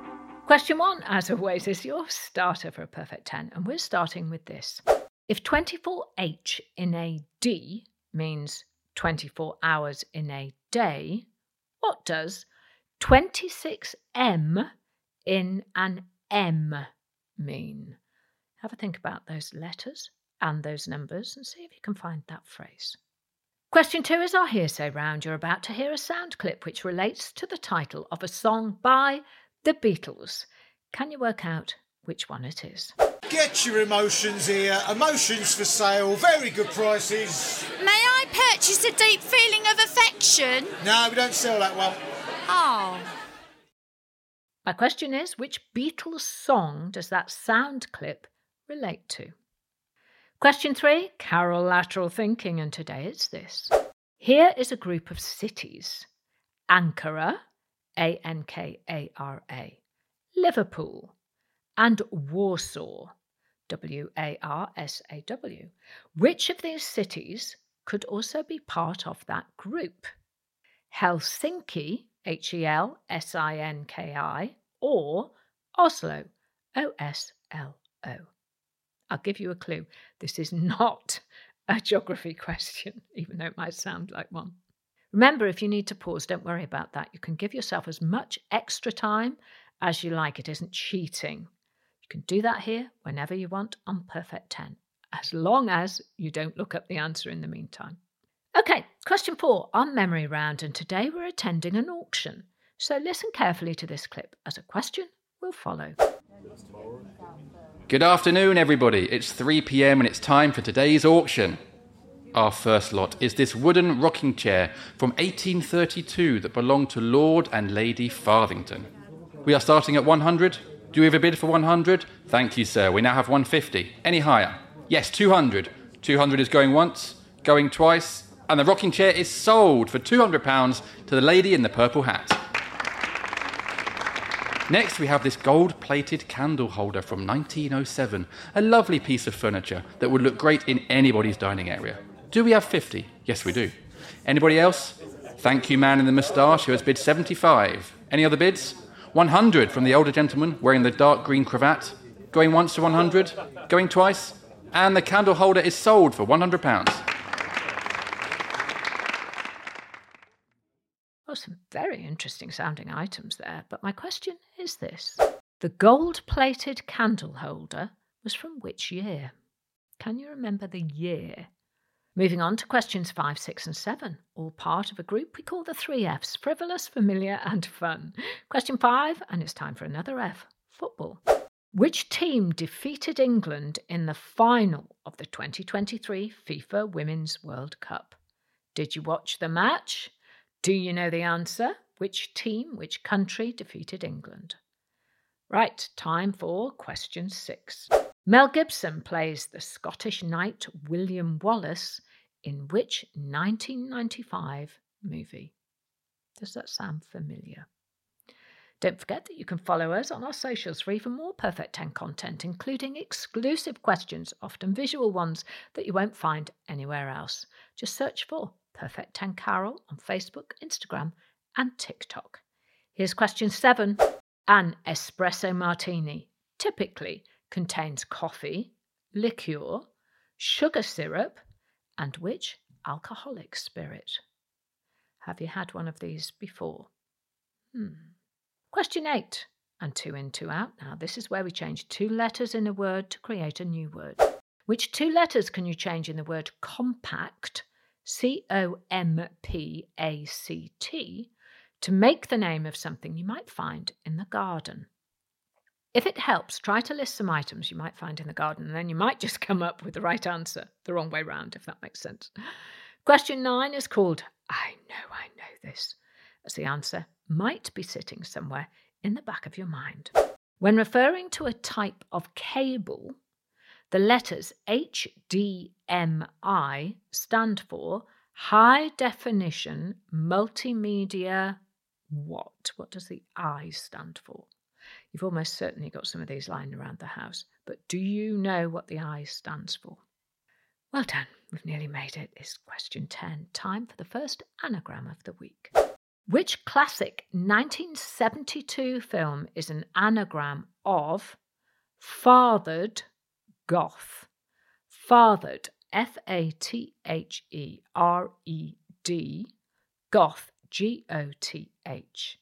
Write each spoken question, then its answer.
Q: The gold-plated candle holder was from which year?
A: The answer was 1907.